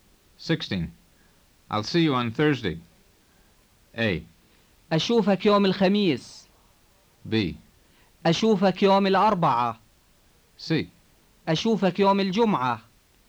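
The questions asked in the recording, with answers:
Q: I'll see you on Thursday.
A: A: أشوفك يوم الخميس.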